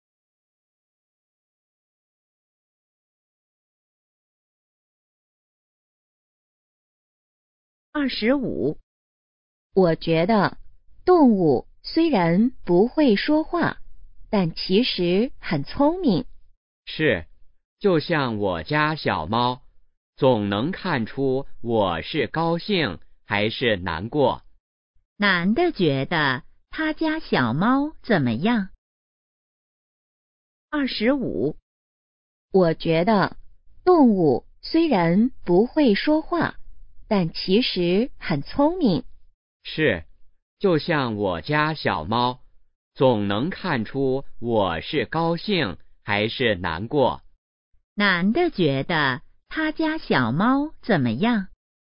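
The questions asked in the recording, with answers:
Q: 男的觉得他家小猫怎么样?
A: 很聪明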